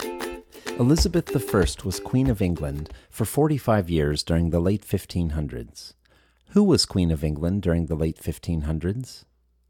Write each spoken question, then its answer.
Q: Who was Queen of England during the late 1500s?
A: Elizabeth I was Queen of England during the late 1500s.